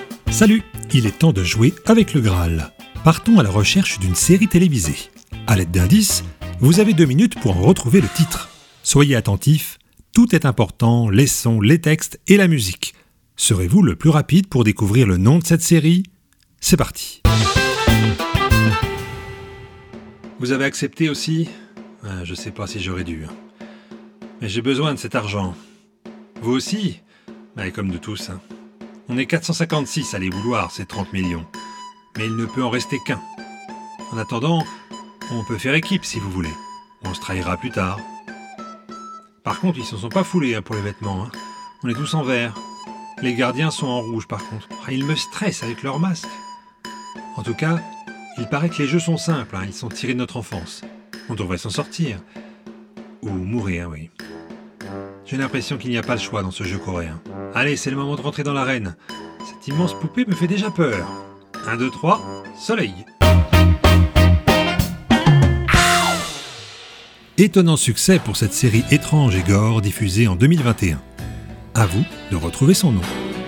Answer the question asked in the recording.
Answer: Neuf épisodes ont suivi pour rendre Squid Game une série planétaire de Netflix.